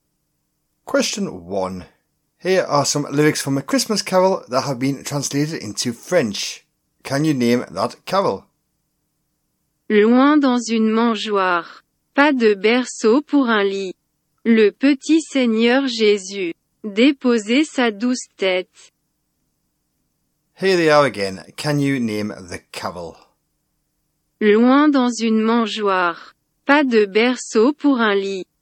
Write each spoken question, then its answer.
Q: Can you name that carol?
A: So the answer is, of course, away in a manger.